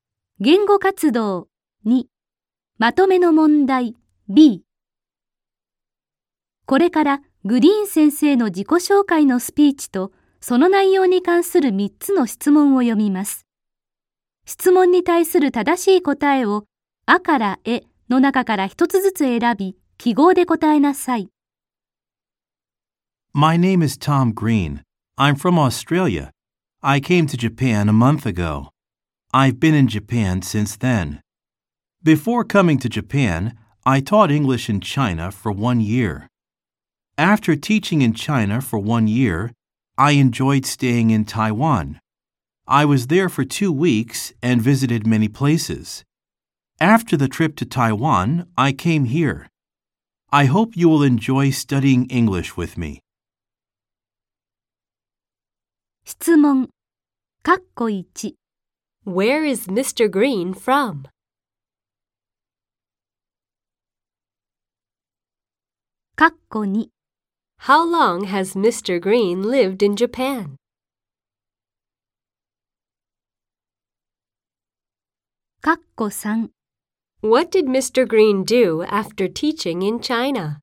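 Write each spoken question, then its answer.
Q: Where is Mr. Green from?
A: Australia

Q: How long has Mr. Green lived in Japan?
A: For a month

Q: What did Mr. Green do after teaching in China?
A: He stayed in Taiwan for 2 weeks and visited many places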